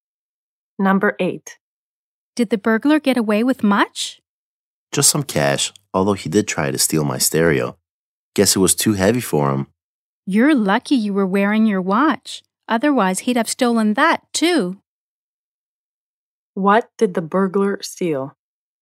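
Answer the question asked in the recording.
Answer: Just some cash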